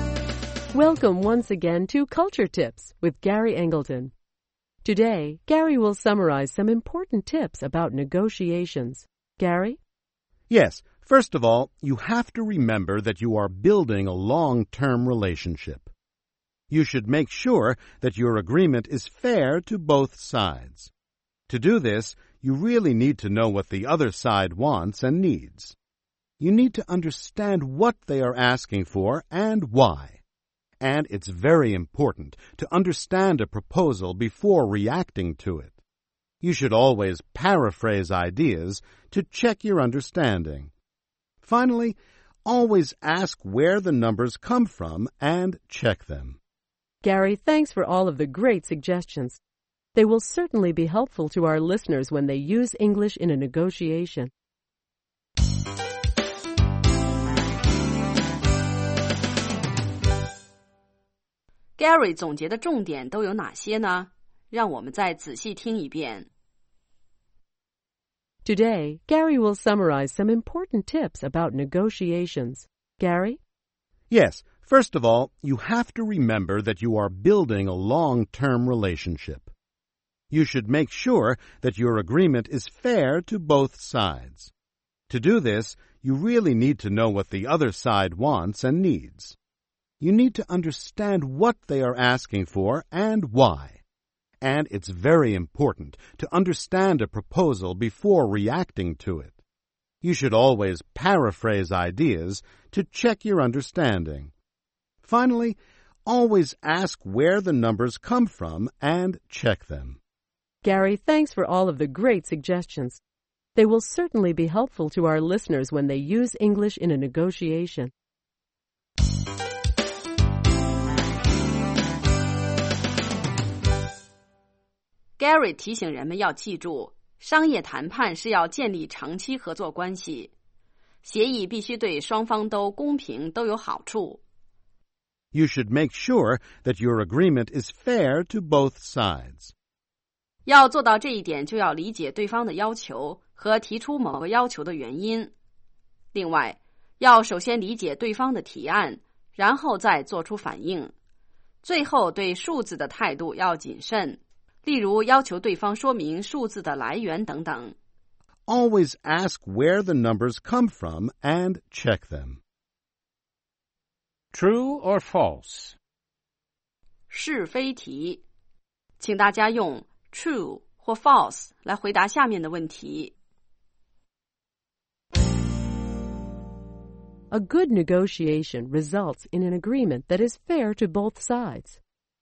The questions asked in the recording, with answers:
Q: A good negotiation results in an agreement that is fair to both sides.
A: True. Negotiation can lead to a win-win situation.